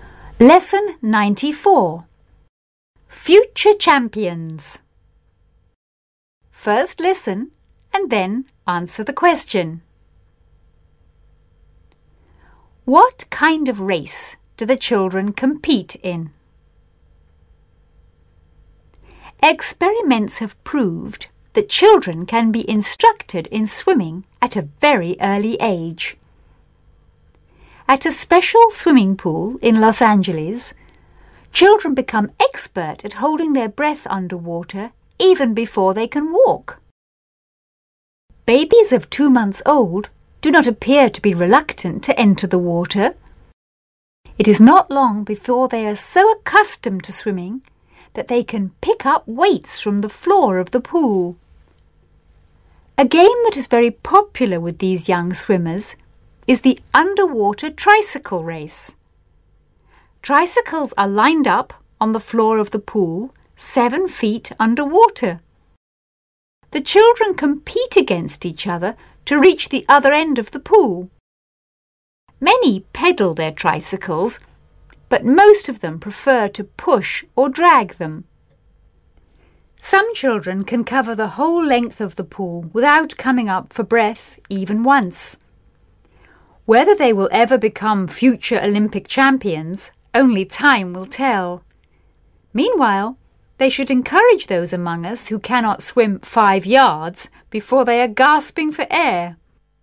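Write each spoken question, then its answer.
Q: What kind of race do the children compete in?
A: An underwater tricycle race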